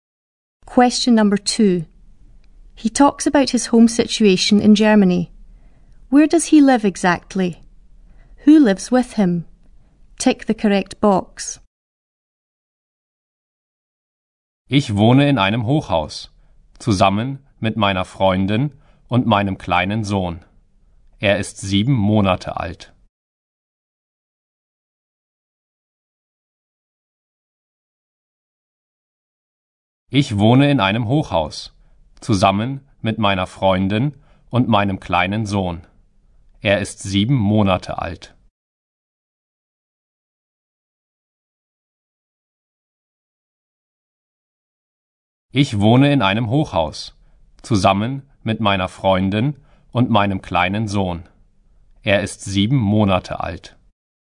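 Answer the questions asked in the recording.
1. In a high-rise block of flats
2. His girlfriend and his 7-month-old son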